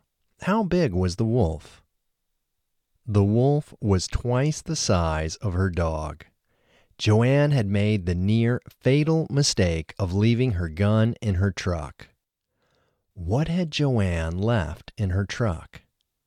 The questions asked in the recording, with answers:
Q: What had Joanne left in her truck?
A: Joanne had left her gun in her truck.